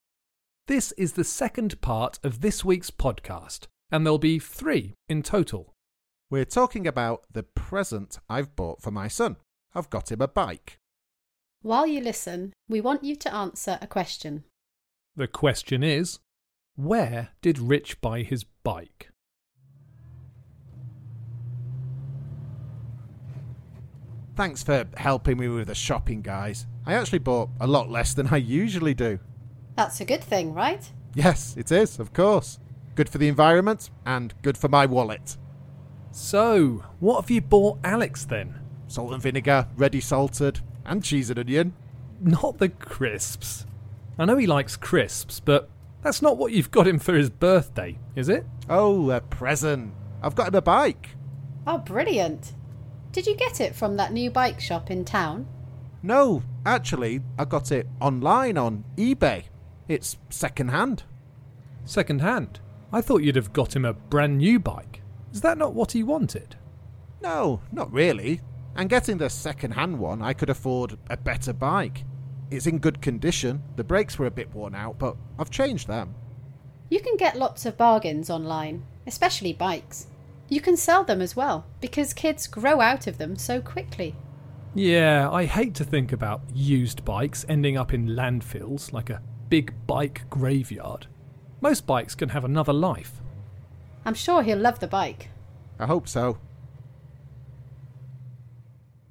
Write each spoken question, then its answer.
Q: The question is, where did Rich buy his bike?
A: I bought the bike online.